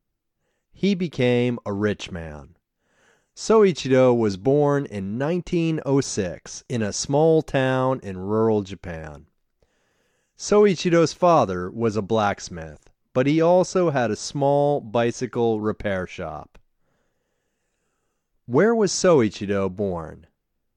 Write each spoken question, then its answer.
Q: Where was Soichiro born?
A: Soichiro was born in a small town in rural Japan.